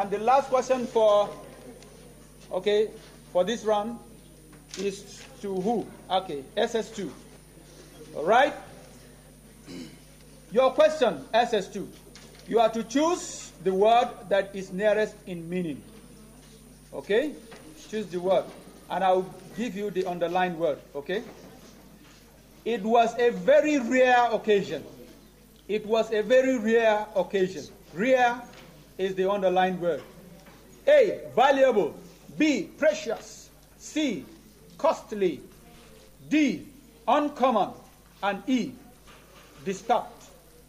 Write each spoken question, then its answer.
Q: It was a very rare occasion.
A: Uncommon! That's the correct answer.